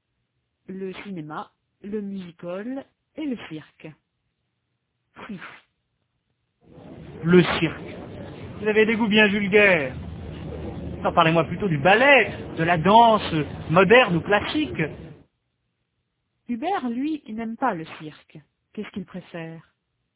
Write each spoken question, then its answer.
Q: Qu'est-ce qu'il préfère ?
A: Le ballet, la danse moderne ou classique.